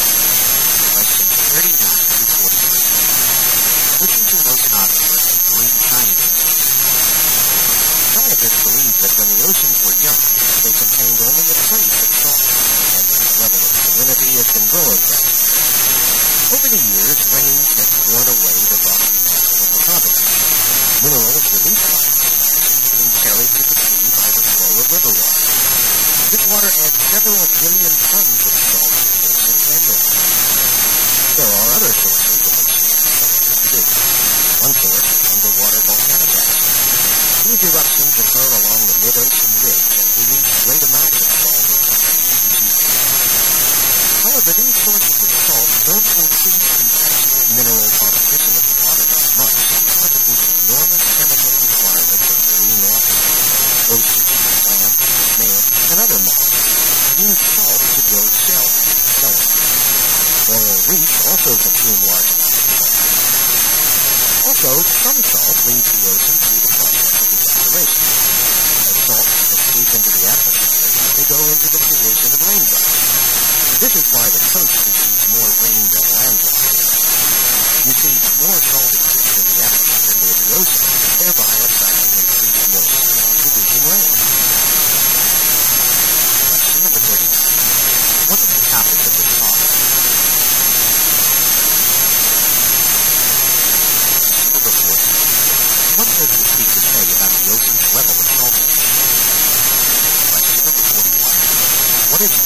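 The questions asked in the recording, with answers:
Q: What is the topic of this talk?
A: Where the ocean's salt comes from and where it goes

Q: What does the speaker say about the ocean's level of saltiness?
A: It has slowly increased over time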